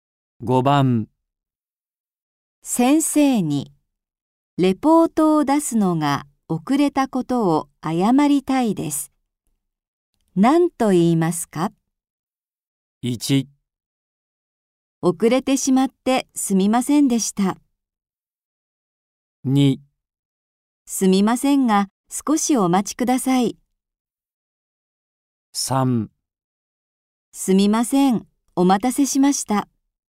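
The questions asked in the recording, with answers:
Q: 何と言いますか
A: 1: 遅れてしまってすみませんでした。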